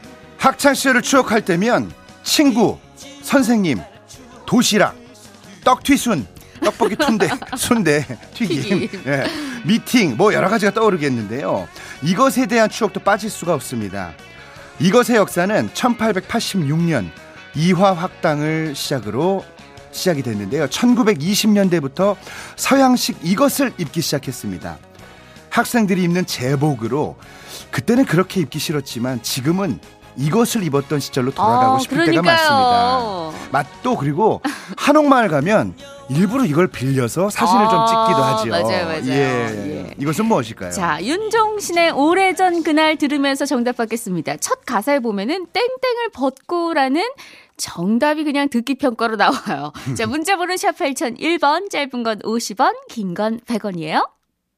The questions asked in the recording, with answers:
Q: 이것은 무엇일까요?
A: 교복이었습니다.